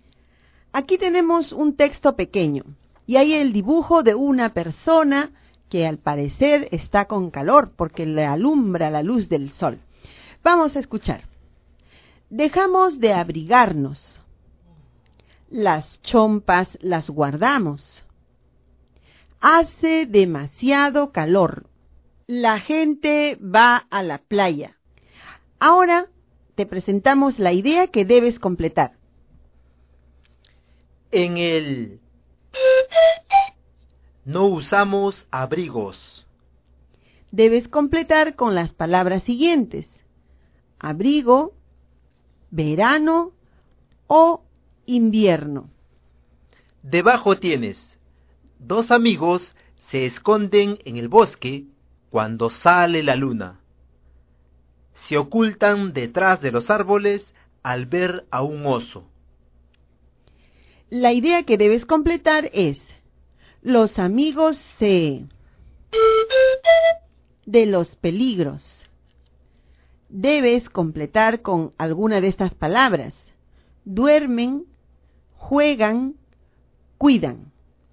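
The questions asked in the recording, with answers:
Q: En el... No usamos abrigos. Debes completar con las palabras siguientes: abrigo, verano o invierno.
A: verano

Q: La idea que debes completar es: los amigos se... de los peligros. Debes completar con alguna de estas palabras: duermen, juegan, cuidan.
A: cuidan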